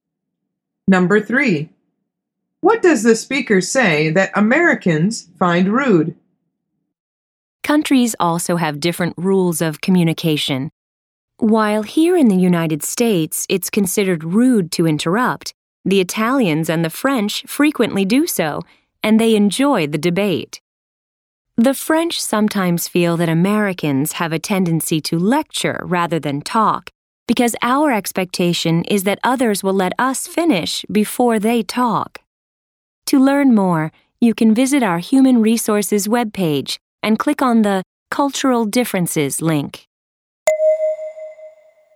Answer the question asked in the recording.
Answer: The answer is interrupting people.